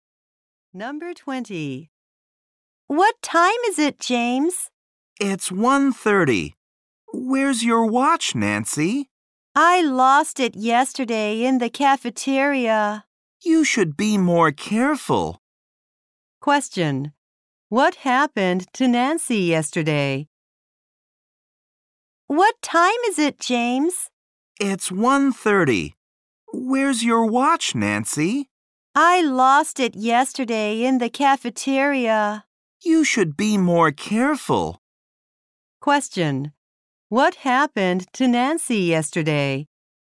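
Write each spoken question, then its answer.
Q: What happened to Nancy yesterday?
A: She lost her watch.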